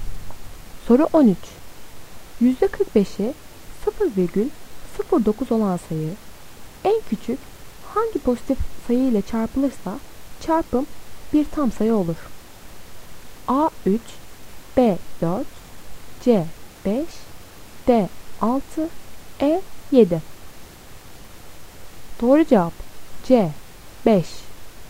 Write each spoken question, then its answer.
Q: %45'i 0,09 olan sayı en küçük hangi pozitif sayı ile çarpılırsa çarpım bir tam sayı olur?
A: Doğru cevap C 5.